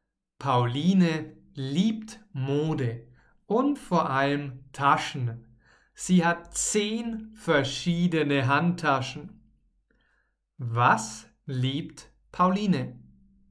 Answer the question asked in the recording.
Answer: Mode. Sie liebt Mode.